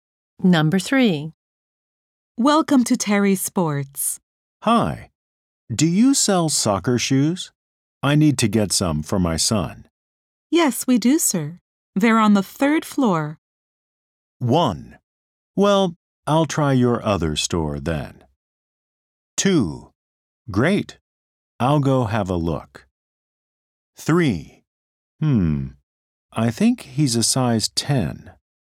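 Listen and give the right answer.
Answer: 2: Great. I'll go have a look.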